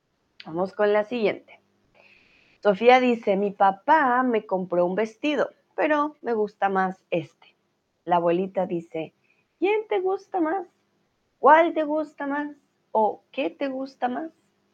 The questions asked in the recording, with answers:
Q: ¿quién te gusta más?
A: Muy bien, ¿cuál? ¿Cuál te gusta más?